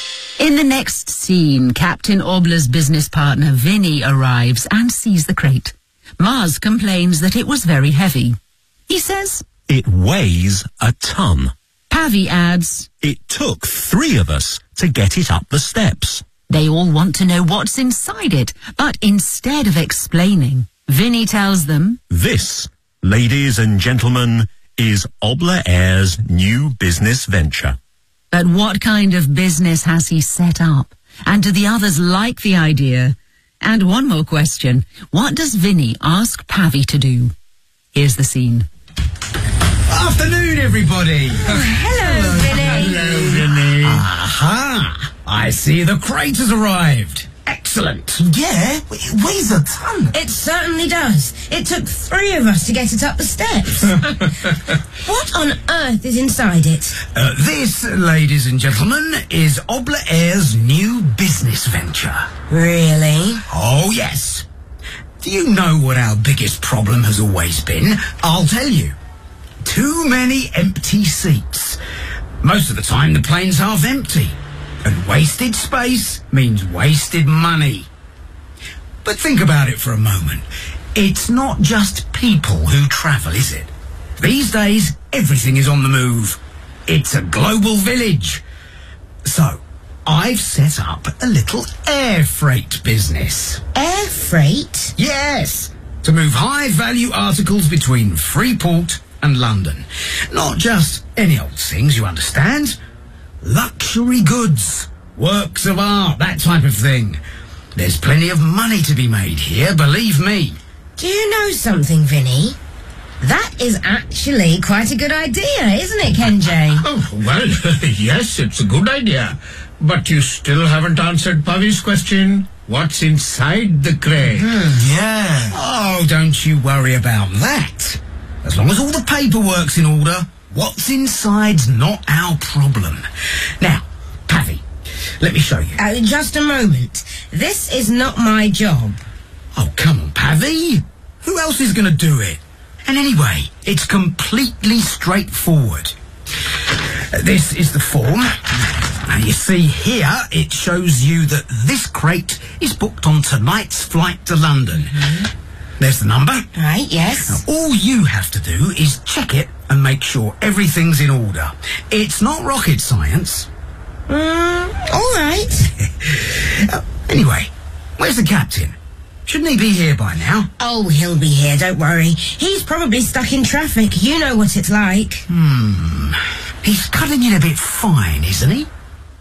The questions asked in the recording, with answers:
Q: But what kind of business has he set up?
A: I've set up a little air freight business.

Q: And do the others like the idea?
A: Yes, Pavi says.

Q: And one more question, what does Vinny ask Pavi to do?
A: all you have to do is check it and make sure everything is in order.